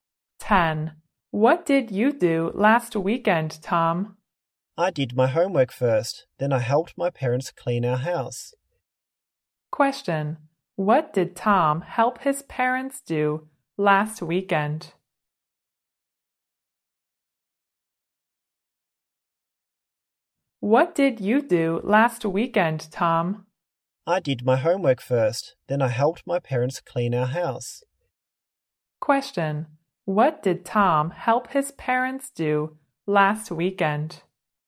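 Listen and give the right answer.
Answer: Clean their house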